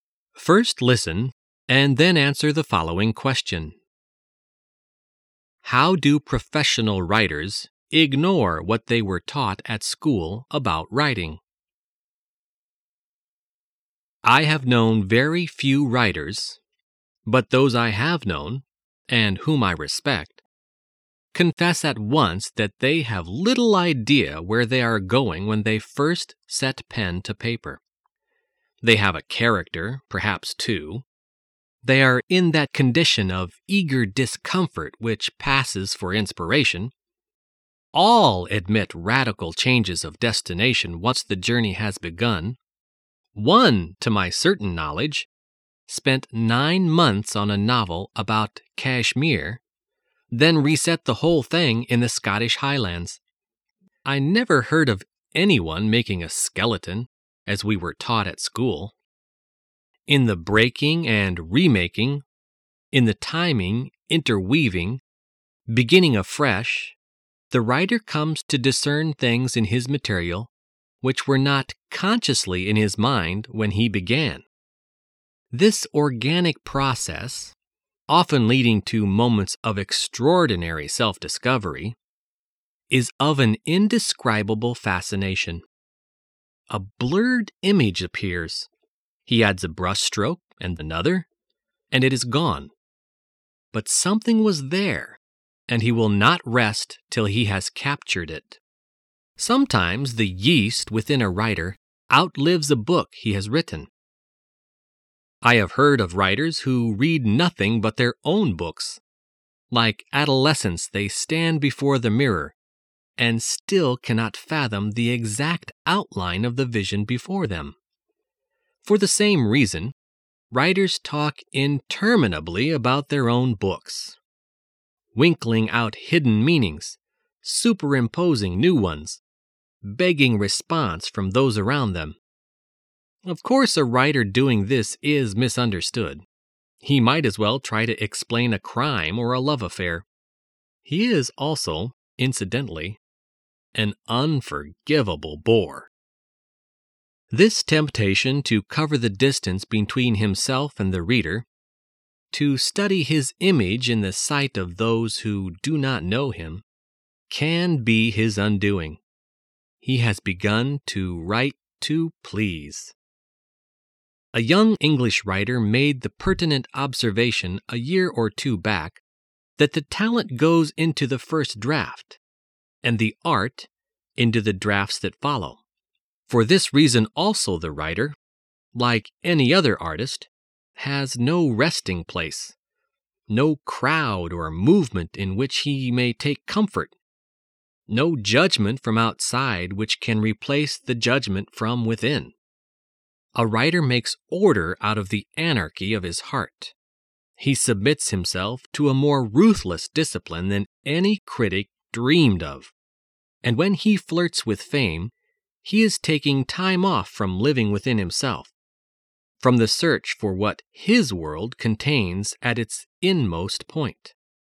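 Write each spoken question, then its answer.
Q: How do professional writers ignore what they were taught at school about writing?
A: They don't make a skeleton (outline) before writing; they start with little idea where they are going.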